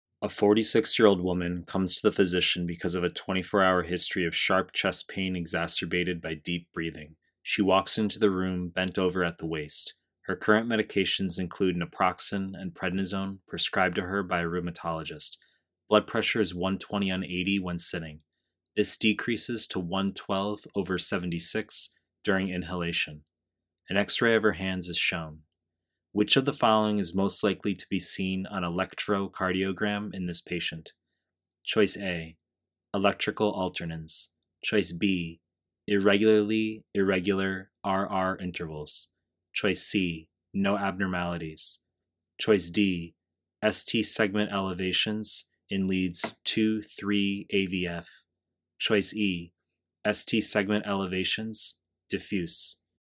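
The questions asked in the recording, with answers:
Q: Which of the following is most likely to be seen on electrocardiogram in this patient?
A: E: ST segment elevations, diffuse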